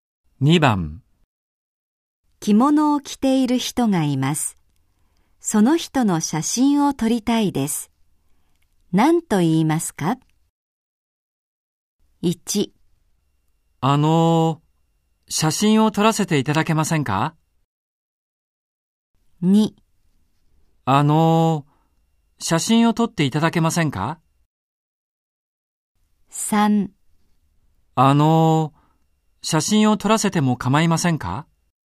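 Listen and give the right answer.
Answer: 1: 写真を撮らせていただけませんか?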